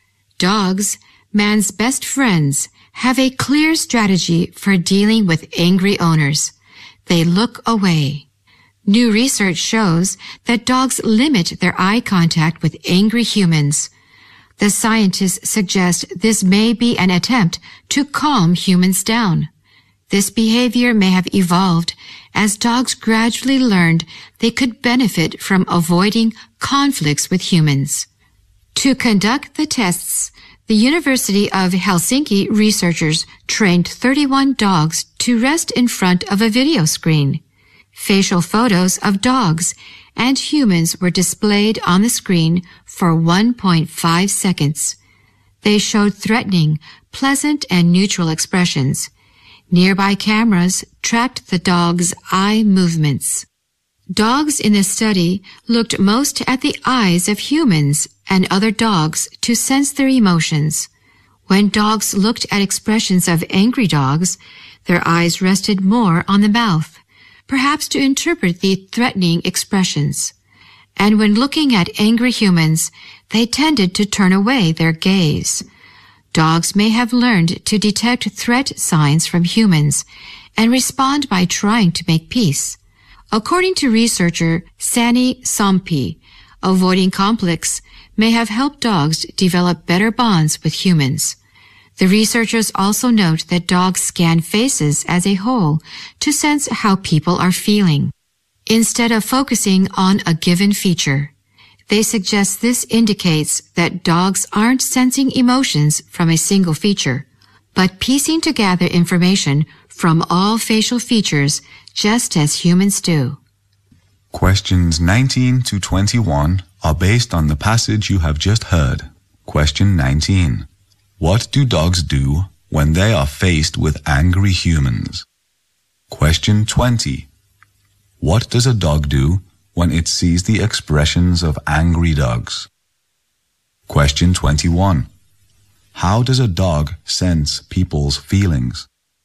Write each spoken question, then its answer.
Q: What do dogs do when they are faced with angry humans?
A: new research shows that dogs limit their eye contact with angry humans,

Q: What does a dog do when it sees the expressions of angry dogs?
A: Their eyes rested more on the mouth of an angry dog。

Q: How does a dog sense people's feelings?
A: Dogs scan faces as a whole、They may put together information from all facial features。